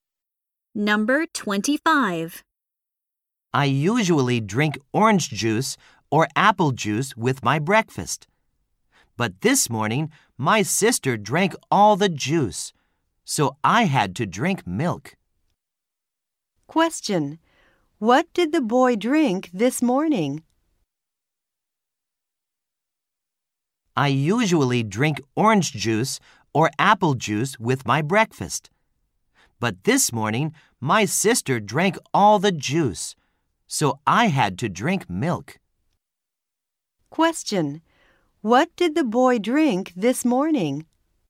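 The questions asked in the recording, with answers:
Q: What did the boy drink this morning?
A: Milk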